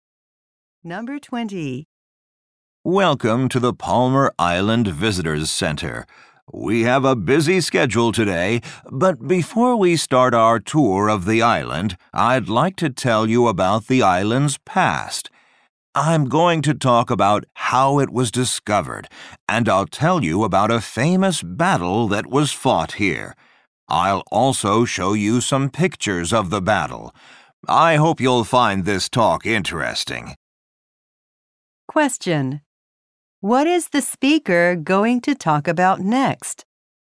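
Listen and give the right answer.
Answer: The island's history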